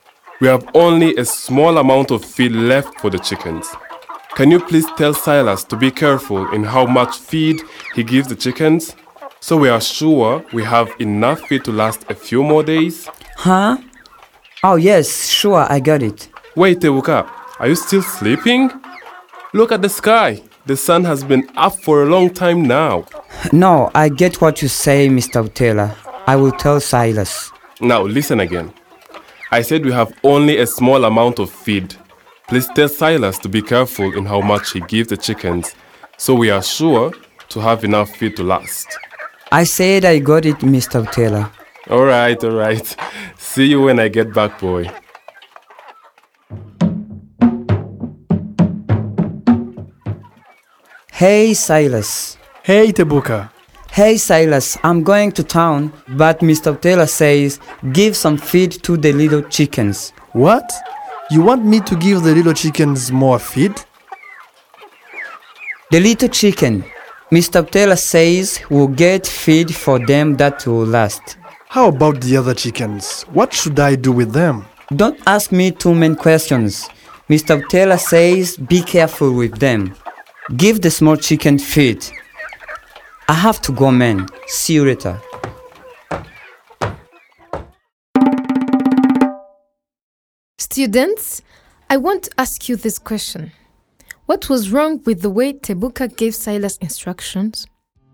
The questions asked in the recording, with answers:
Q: What was wrong with the way Tebuka gave Silas instructions?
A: Maybe you said Tebuka was in a rush.